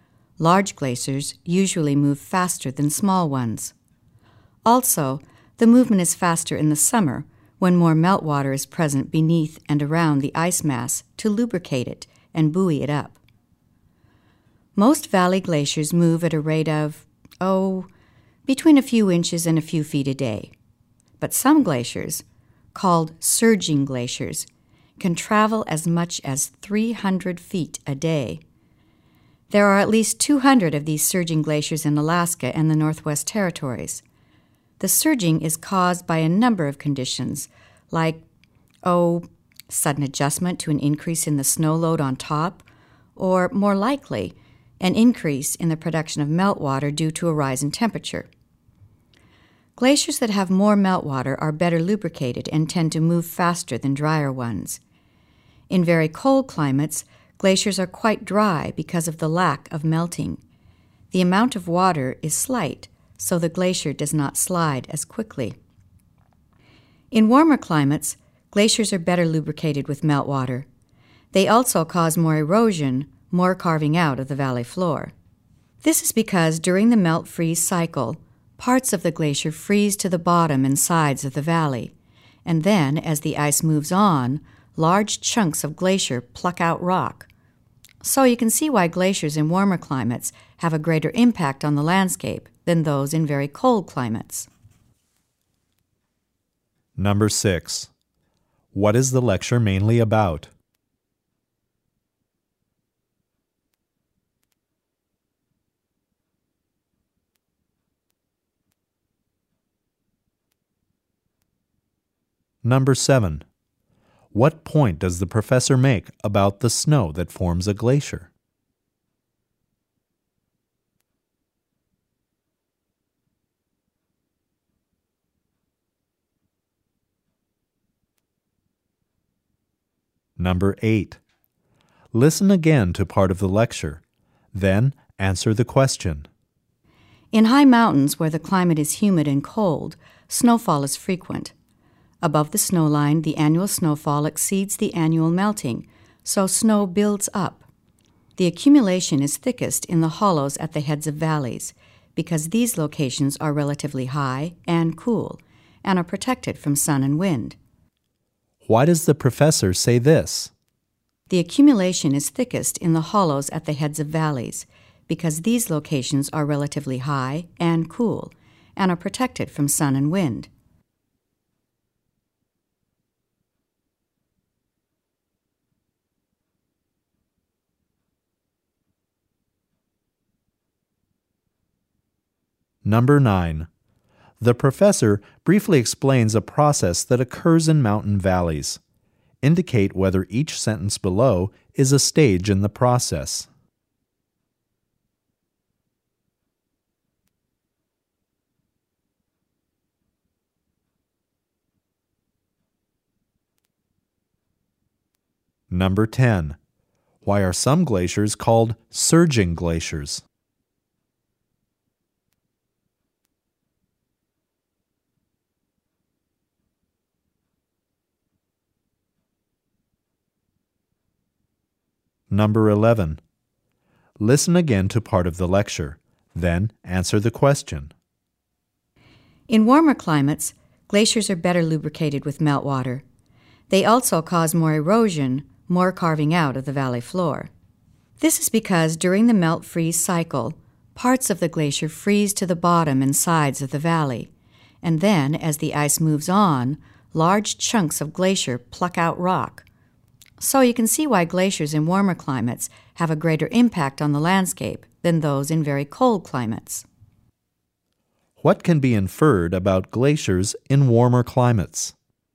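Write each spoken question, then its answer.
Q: Why are some glaciers called surging glaciers?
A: They can move very fast, as much as 300 feet a day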